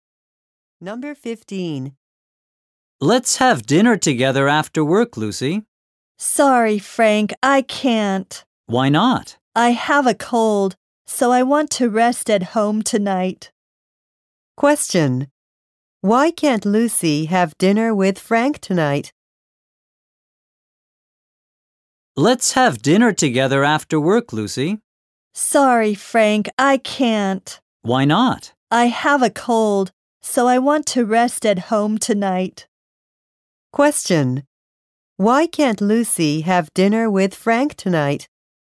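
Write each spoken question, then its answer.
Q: Why can't Lucy have dinner with Frank tonight?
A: She has a cold.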